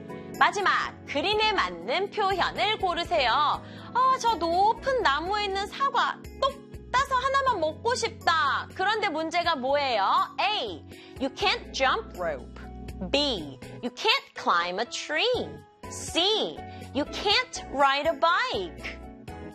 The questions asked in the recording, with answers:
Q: 그런데 문제가 뭐예요?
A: 나무에 올라갈 수가 없잖아요.